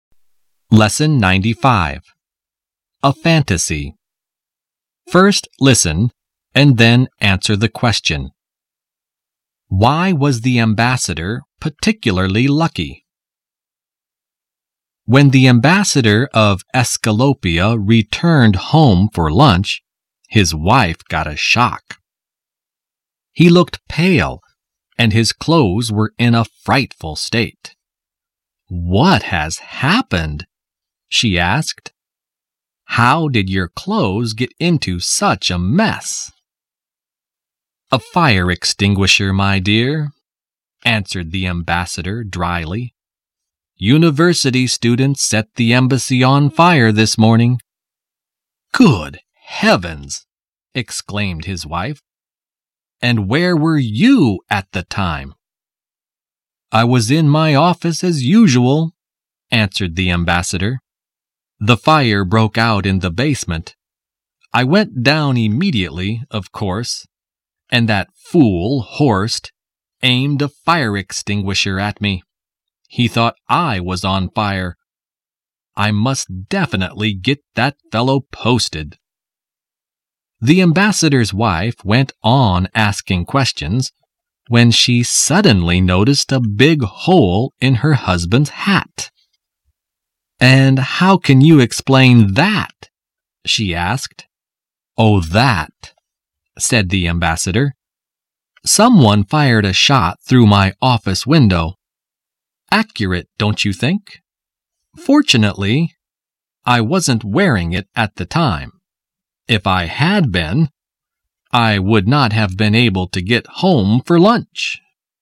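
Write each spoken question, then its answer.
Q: Why was the ambassador particularly lucky?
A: He wasn't wearing his hat when someone fired a shot through it, so he wasn't hurt.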